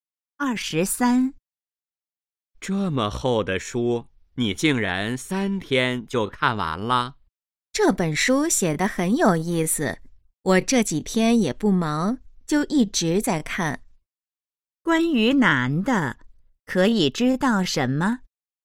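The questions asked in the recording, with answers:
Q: 关于男的,可以知道什么?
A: 三天就看完了一本很厚的书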